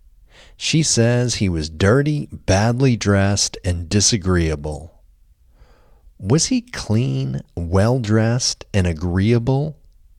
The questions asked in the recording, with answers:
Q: Was he clean, well-dressed, and agreeable?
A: No, he was not clean, well-dressed, and agreeable.